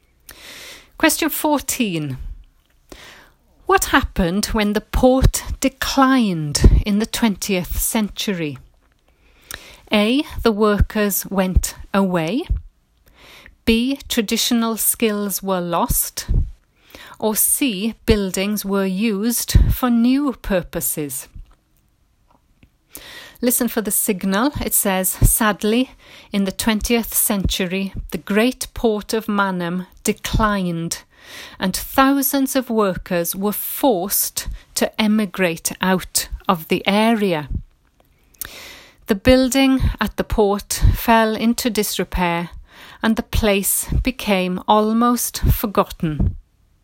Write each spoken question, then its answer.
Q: What happened when the port declined in the 20th century?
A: the first one was the workers went away, and I think that, well, it is the answer.